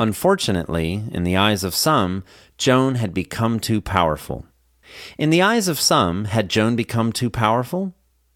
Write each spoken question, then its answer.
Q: In the eyes of some, had Joan become too powerful?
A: Yes, in the eyes of some, Joan had become too powerful.